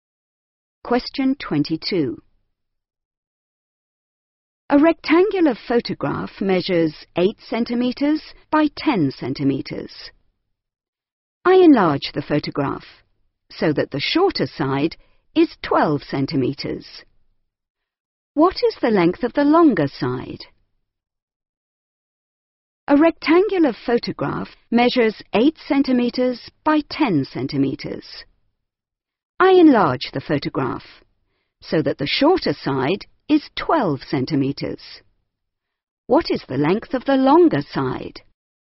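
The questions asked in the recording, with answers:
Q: What is the length of the longer side?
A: 15 centimetres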